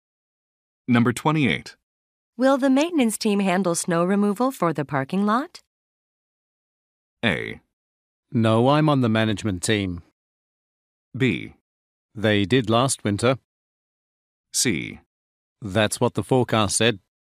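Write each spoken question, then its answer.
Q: Will the maintenance team handle snow removal for the parking lot?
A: B: They did last winter.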